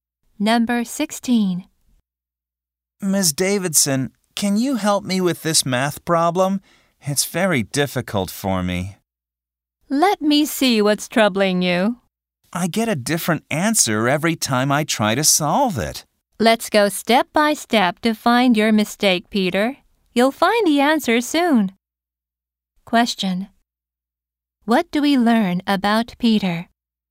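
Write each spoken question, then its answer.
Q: Question. What do we learn about Peter?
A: He can't solve a math problem.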